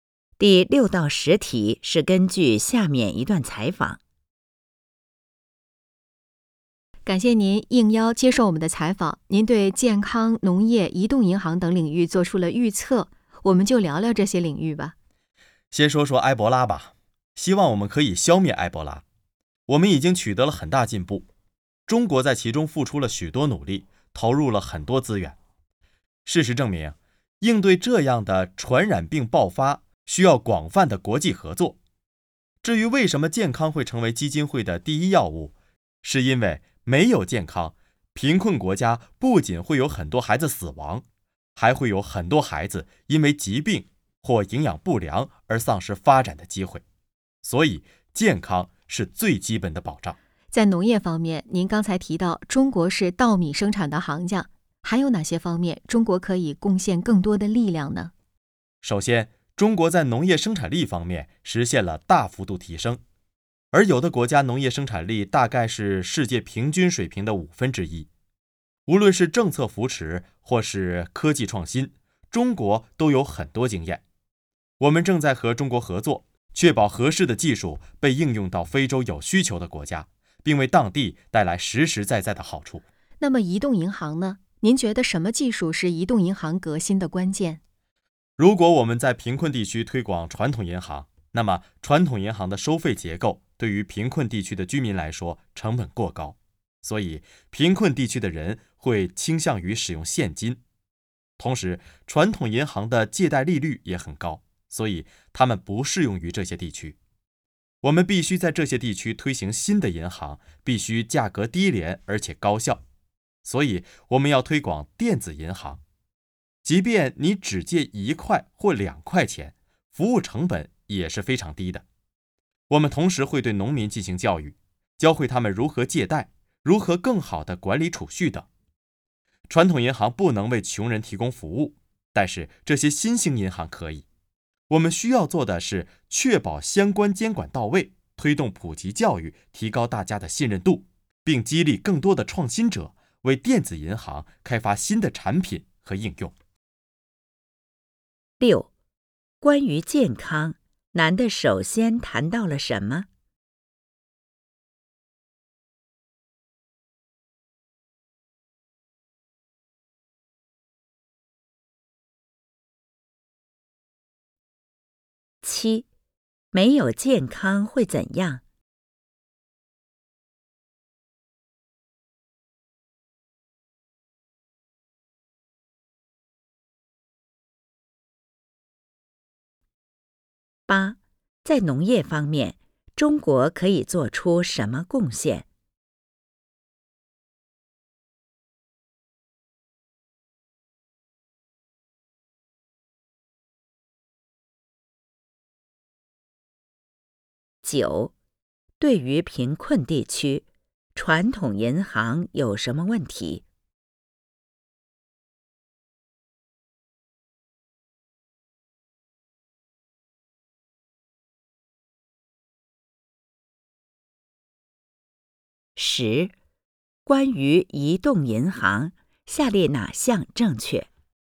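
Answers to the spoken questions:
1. 埃博拉
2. 贫困国家很多孩子会死亡,还有很多孩子因疾病或营养不良丧失发展机会
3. 分享政策扶持和科技创新经验,把合适的技术应用到非洲有需求的国家
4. 收费成本过高,借贷利率也很高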